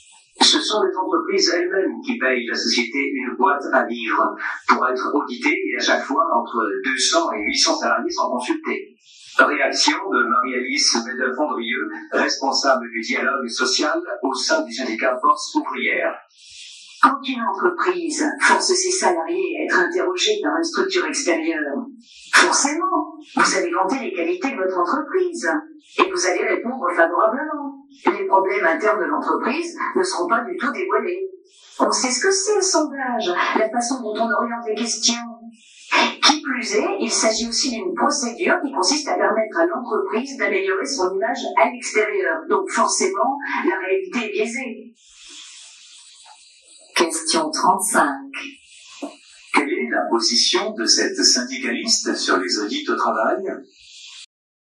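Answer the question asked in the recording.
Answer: Elle s'en méfie : selon elle, les résultats sont biaisés parce que les salariés sont forcés de répondre favorablement, les problèmes internes ne sont pas dévoilés, et l'audit sert à améliorer l'image de l'entreprise.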